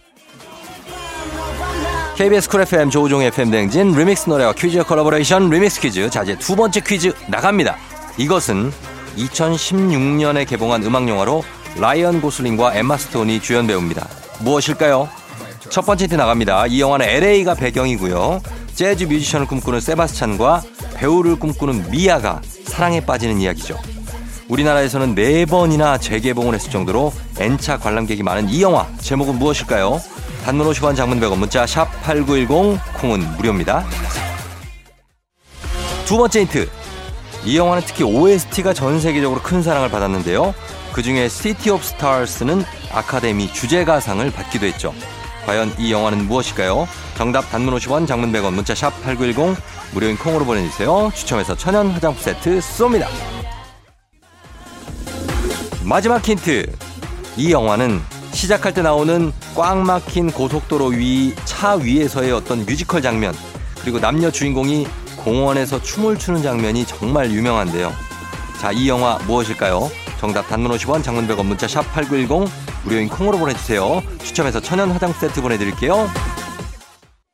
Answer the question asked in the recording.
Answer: 라라랜드